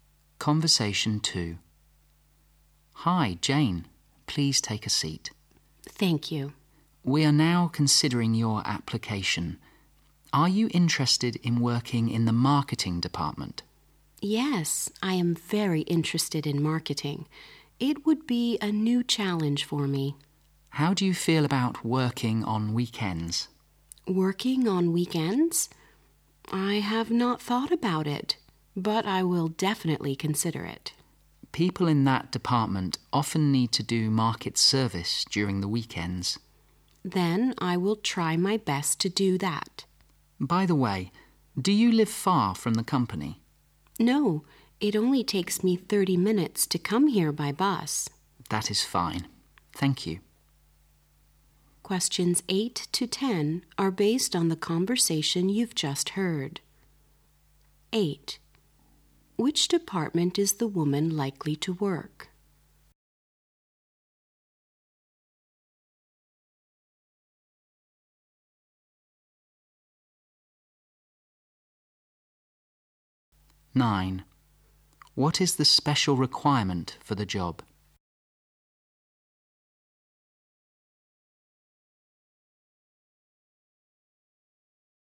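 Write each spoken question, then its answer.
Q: Which department is the woman likely to work?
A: The marketing department.

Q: What is the special requirement for the job?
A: Working on weekends.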